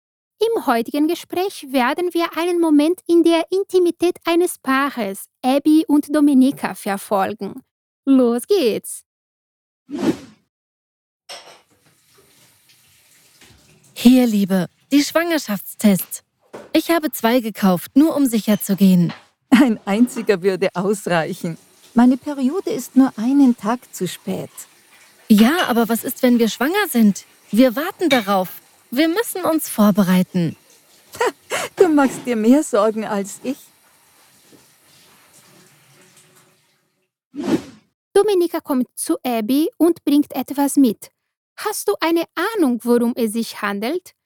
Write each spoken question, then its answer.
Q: Hast du eine Ahnung, worum es sich handelt?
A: Es ist eine Art von Test.